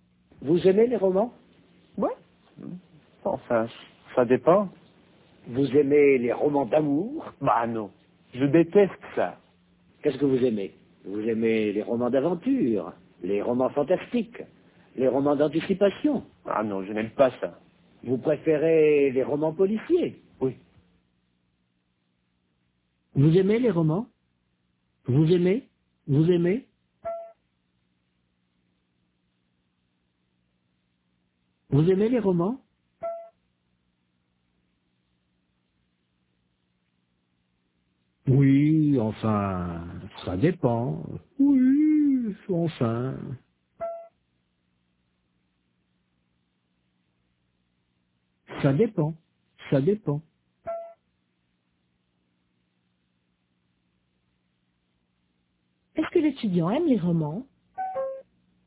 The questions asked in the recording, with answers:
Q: Est-ce que l'étudiant aime les romans?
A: Oui, enfin, ça dépend.